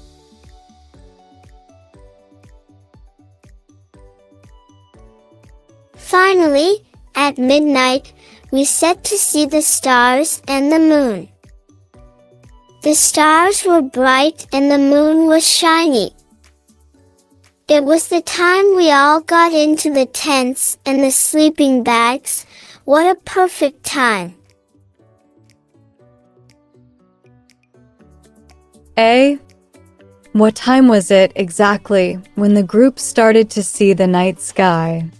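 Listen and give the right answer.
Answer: At midnight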